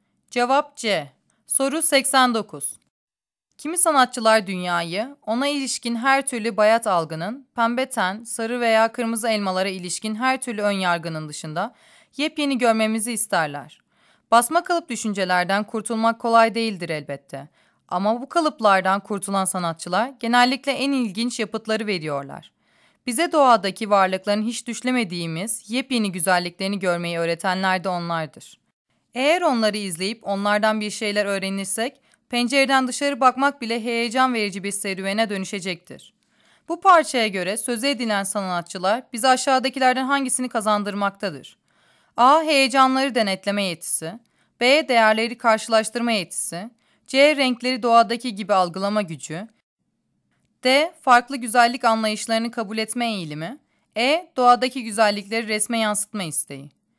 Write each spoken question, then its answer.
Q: Bu parçaya göre söze edilen sanatçılar bize aşağıdakilerden hangisini kazandırmaktadır?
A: Cevap D.